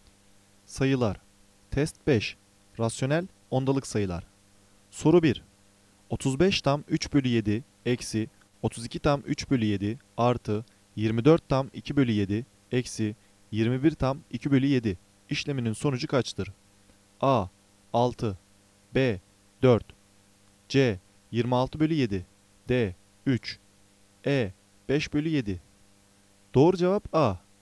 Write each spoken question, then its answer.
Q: 35 tam 3 bölü 7 eksi 32 tam 3 bölü 7 artı 24 tam 2 bölü 7 eksi 21 tam 2 bölü 7 işleminin sonucu kaçtır?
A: Doğru cevap A.